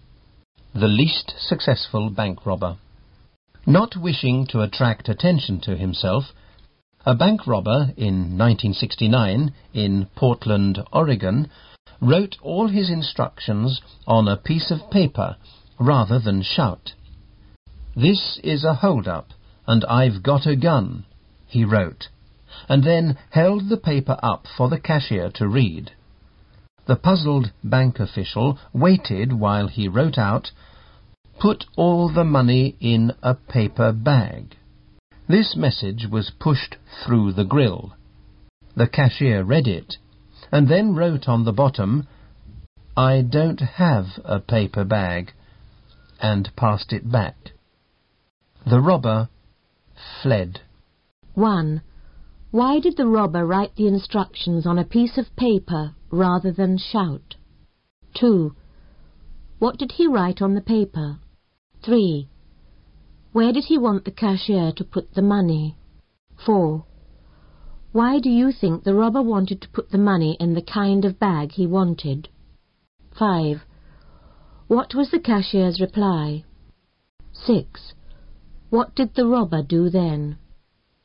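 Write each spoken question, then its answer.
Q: Why did the robber write the instructions on a piece of paper rather than shout?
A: He did not wish to attract attention to himself.

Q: What did he write on the paper?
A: "This is a hold-up, and I've got a gun."

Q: Where did he want the cashier to put the money?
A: In a paper bag.

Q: What was the cashier's reply?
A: "I don't have a paper bag."

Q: What did the robber do then?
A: He fled.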